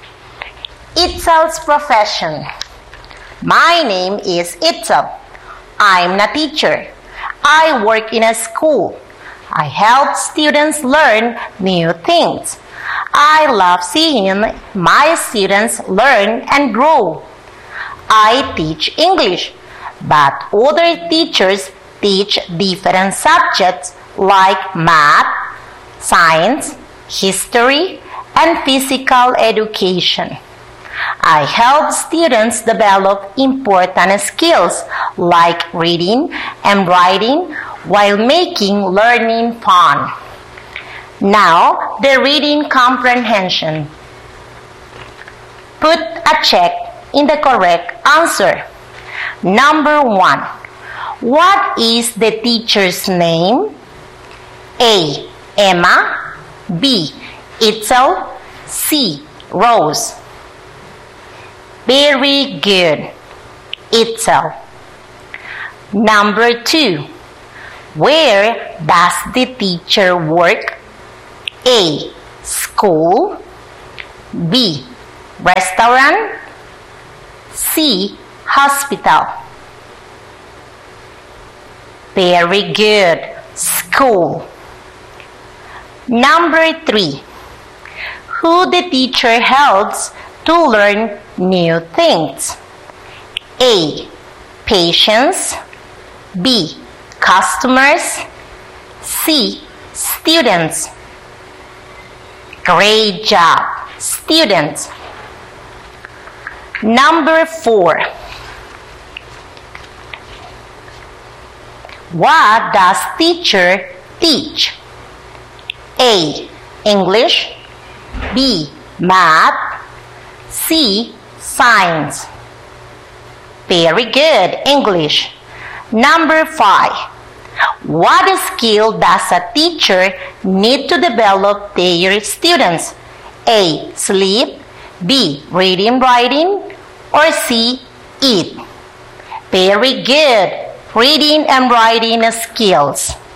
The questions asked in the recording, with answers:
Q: What is the teacher's name?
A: Very good. Itzel.

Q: Where does the teacher work?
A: Very good. School.

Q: Who the teacher helps to learn new things?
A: Great job. Students.

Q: What does teacher teach?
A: Very good, English.